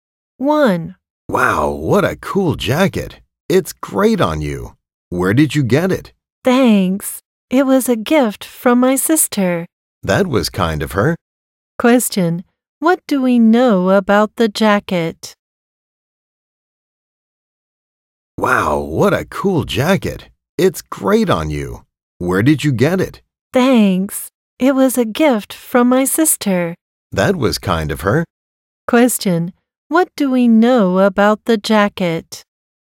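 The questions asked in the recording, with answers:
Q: What do we know about the jacket?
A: It was a gift from the speaker's sister.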